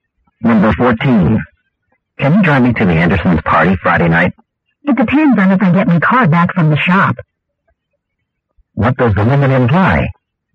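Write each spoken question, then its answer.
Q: What does the woman imply?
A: She may not have her car back by Friday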